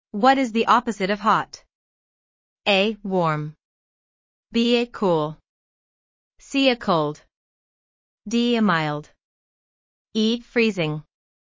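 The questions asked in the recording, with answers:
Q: What is the opposite of hot?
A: C: Cold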